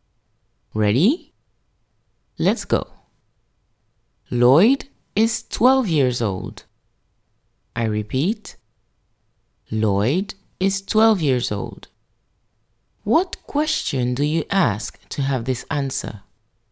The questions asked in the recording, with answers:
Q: What question do you ask to have this answer?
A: The question to ask to have this answer is, how old is Lloyd?